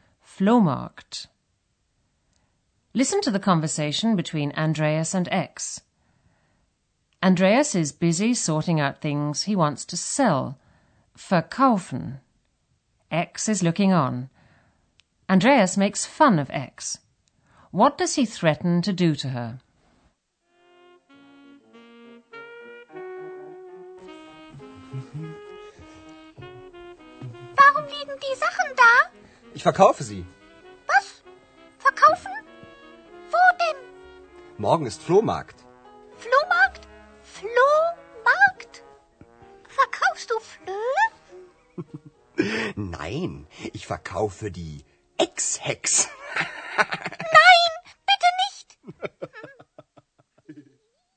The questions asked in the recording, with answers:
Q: What does he threaten to do to her?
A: Andreas threatens to sell X along with his belongings.